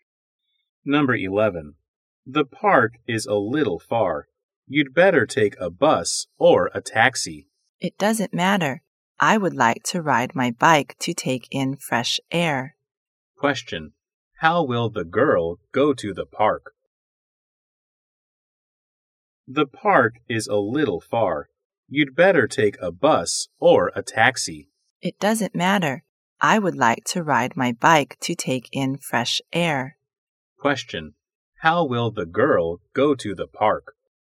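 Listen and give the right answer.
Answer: By bike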